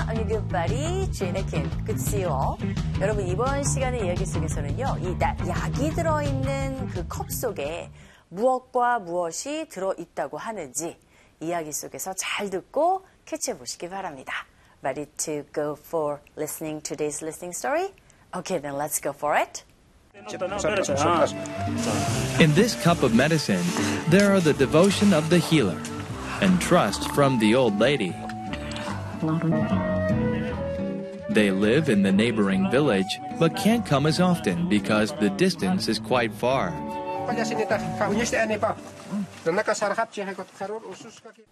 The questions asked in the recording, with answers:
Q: 이 약이 들어있는 그 컵 속에 무엇과 무엇이 들어있다고 하는지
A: Healer, 즉 칼라와의 그 devotion, 헌신과 그리고 노부인의 뭐요?